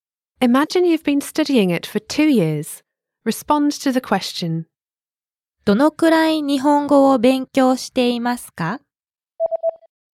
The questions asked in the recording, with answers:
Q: どのくらい日本語を勉強していますか?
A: 2年間です。